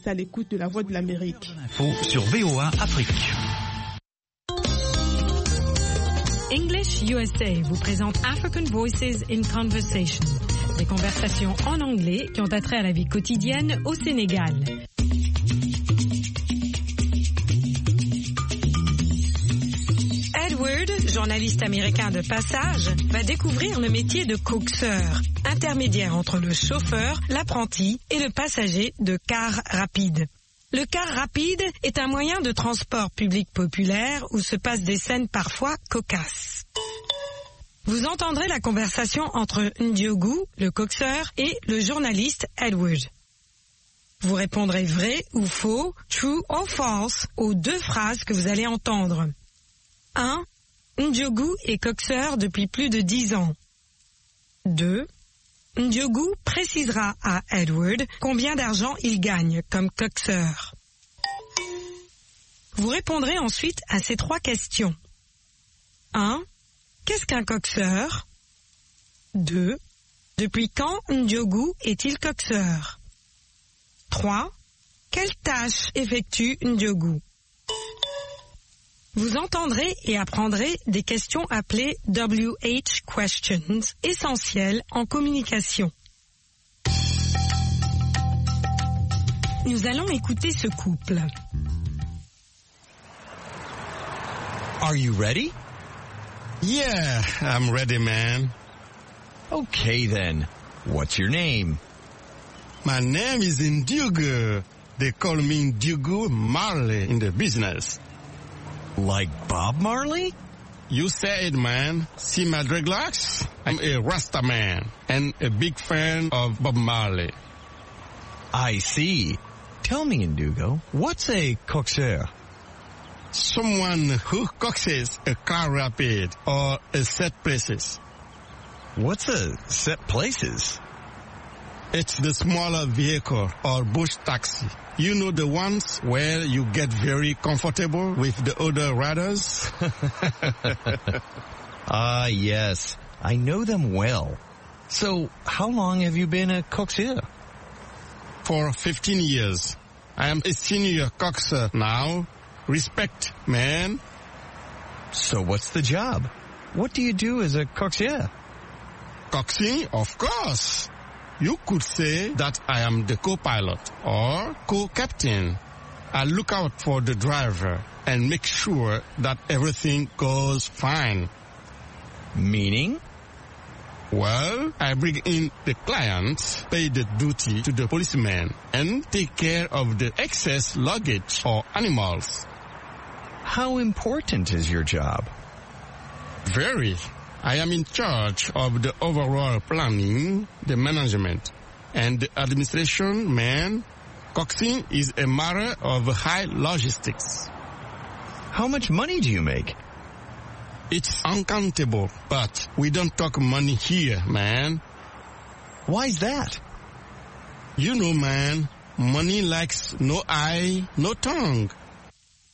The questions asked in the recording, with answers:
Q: Ndiogou est coxeur depuis plus de 10 ans.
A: L'énoncé 1 est vrai.

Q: Ndiogou précisera à Edward combien d'argent il gagne comme coxeur.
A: L'énoncé 2 est faux.

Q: Qu'est-ce qu'un coxeur?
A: Quelqu'un qui coxe un véhicule.

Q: Depuis quand Ndiogou est-il coxeur?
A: Depuis 15 ans maintenant.

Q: Quelle tâche effectue Ndiogou?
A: Des tâches de planning, de gestion et d'administration.